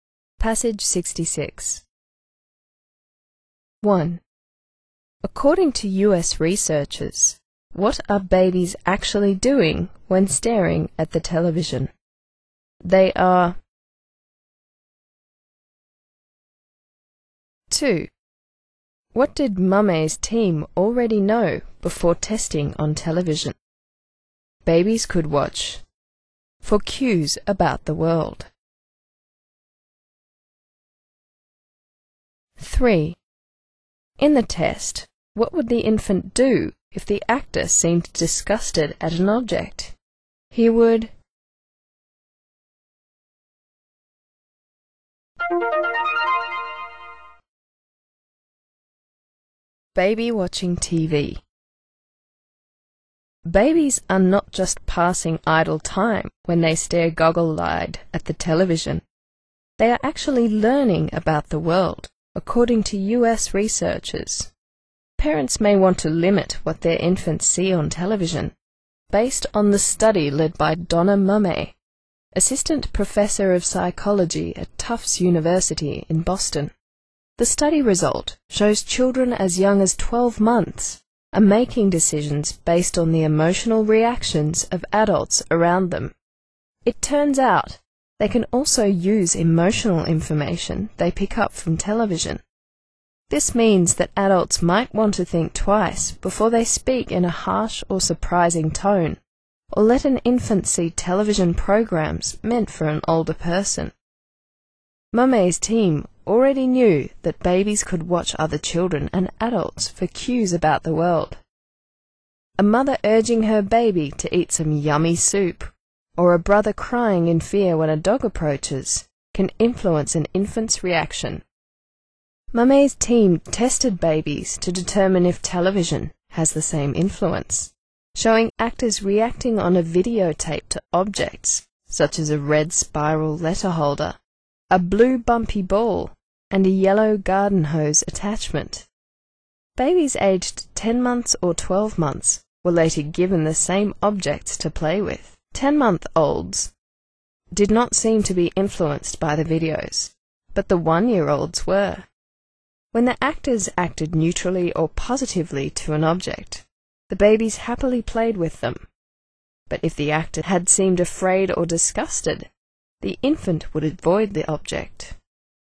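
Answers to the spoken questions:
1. They are learning about the world.
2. Babies could watch other children and adults for cues about the world.
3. He would avoid the object.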